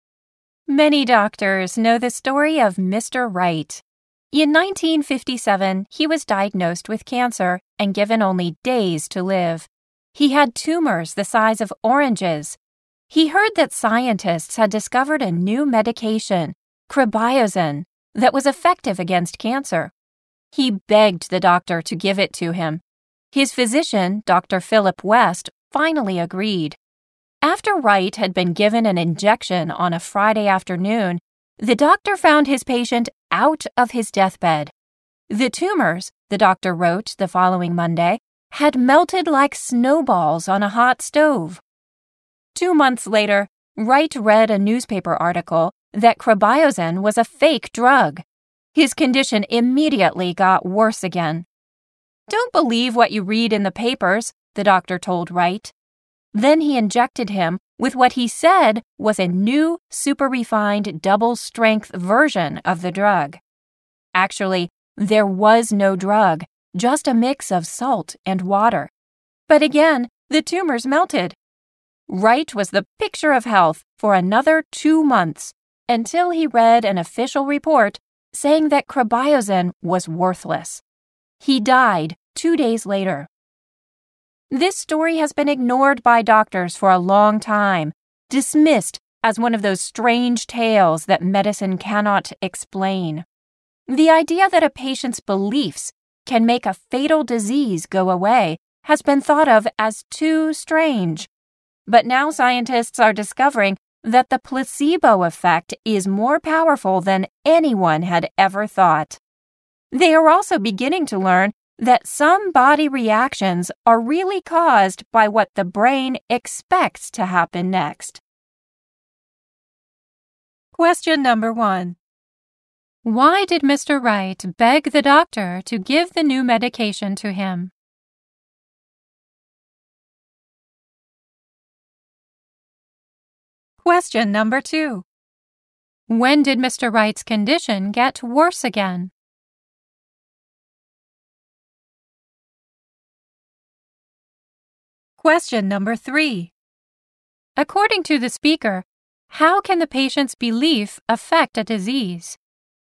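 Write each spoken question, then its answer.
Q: Why did Mr. Wright beg the doctor to give the new medication to him?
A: Because he heard it was effective against cancer.

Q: When did Mr. Wright's condition get worse again?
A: When he read a newspaper article saying cribozin was a fake drug.

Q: According to the speaker, how can the patient's belief affect a disease?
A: It can make a fatal disease go away (the placebo effect).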